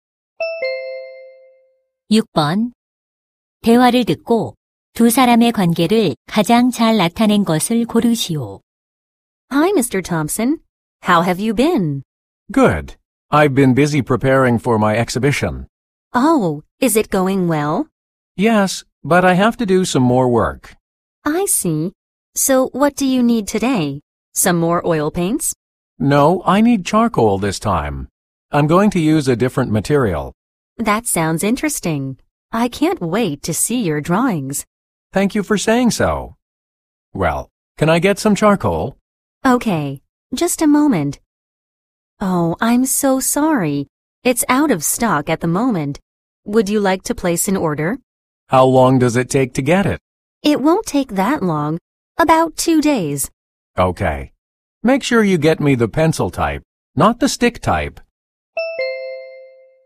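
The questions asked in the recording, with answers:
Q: 대화를 듣고 두 사람의 관계를 가장 잘 나타낸 것을 고르시오.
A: 화가 - 화방 점원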